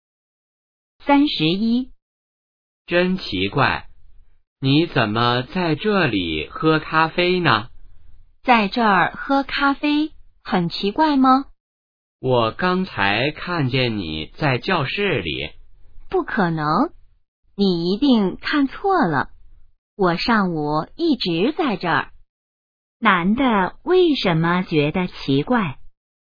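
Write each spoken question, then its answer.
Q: 男的为什么觉得奇怪?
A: 他刚才看见女的在教室里,可女的却在这里喝咖啡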